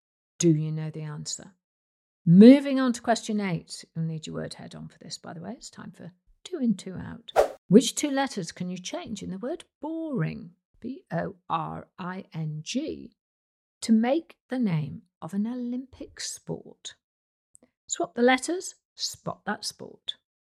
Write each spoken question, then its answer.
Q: Which two letters can you change in the word boring, B-O-R-I-N-G, to make the name of an Olympic sport?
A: Well, if you change the letter B for an R and the letter R in boring for a W, you'd come up with rowing.